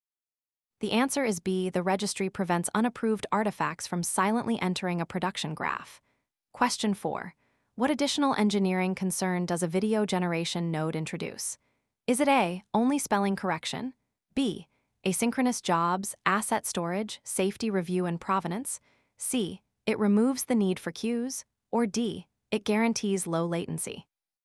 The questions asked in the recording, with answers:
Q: What additional engineering concern does a video generation node introduce?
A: The answer is B, non-text outputs require different execution, storage, and review contracts.